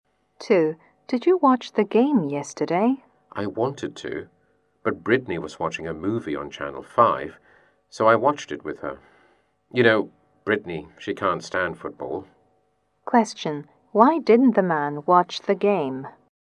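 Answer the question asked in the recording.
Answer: He watched a movie with Brittany, who can't stand football.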